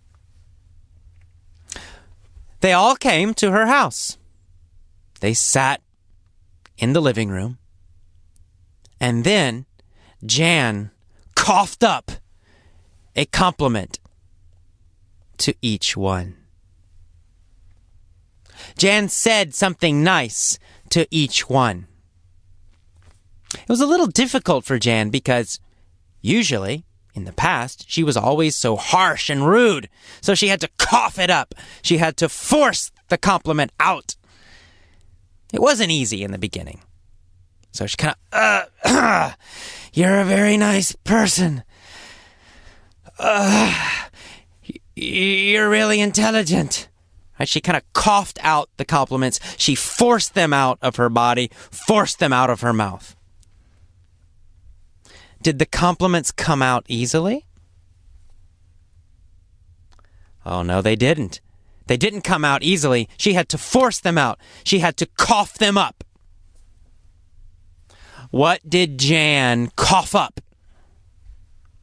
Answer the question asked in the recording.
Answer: Compliments.